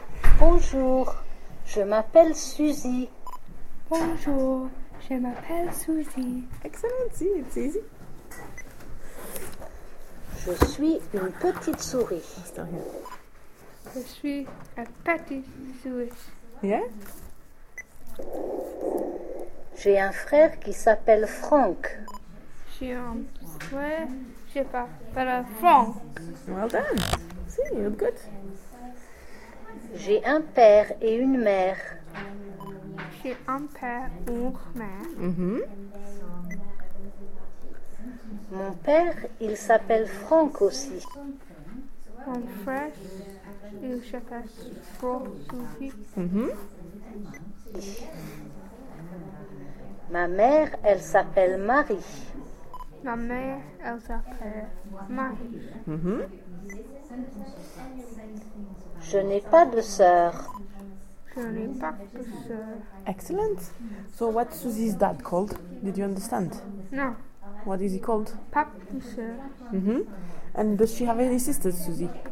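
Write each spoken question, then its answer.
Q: So what's Susie's dad called?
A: Franck

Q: And does she have any sisters, Susie?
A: No, she has no sisters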